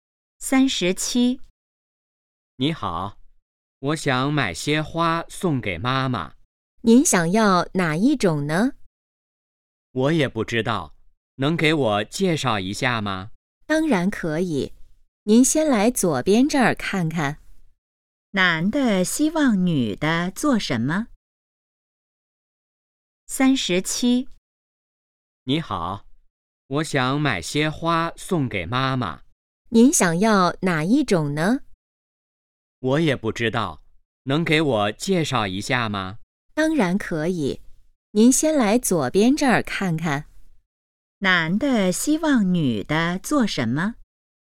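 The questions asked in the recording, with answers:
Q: 男的希望女的做什么?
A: 给他介绍一下花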